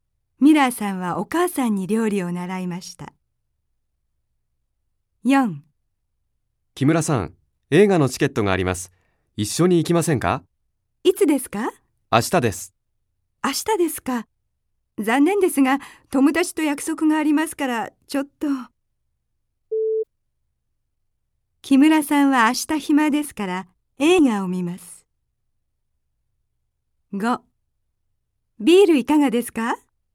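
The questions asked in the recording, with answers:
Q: 木村さんは明日暇ですから、映画を見ます。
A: ×(友達と約束があります)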